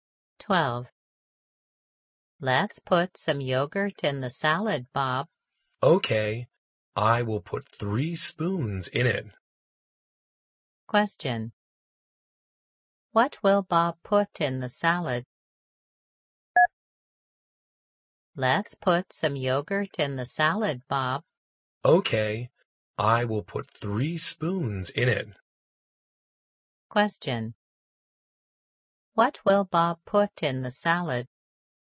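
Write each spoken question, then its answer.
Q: What will Bob put in the salad?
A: Yogurt (3 spoons)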